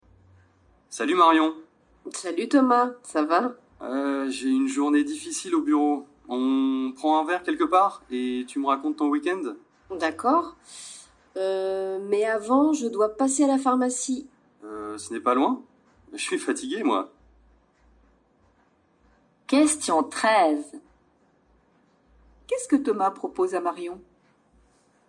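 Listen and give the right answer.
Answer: De prendre un verre quelque part et qu'elle lui raconte son week-end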